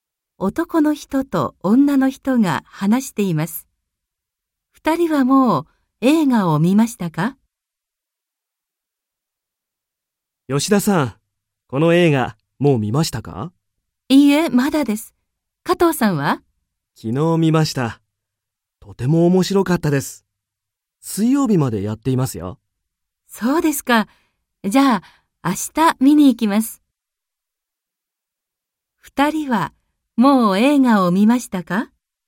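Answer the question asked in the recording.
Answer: 加藤さんは昨日見ましたが、吉田さんはまだ見ていません(明日見に行きます)。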